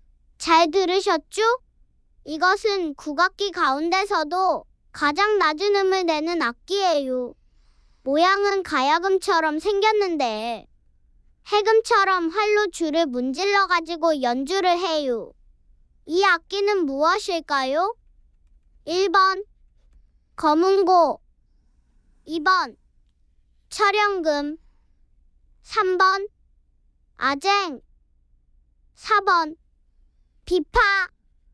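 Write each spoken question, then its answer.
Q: 이 악기는 무엇일까요?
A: 3번: 아쟁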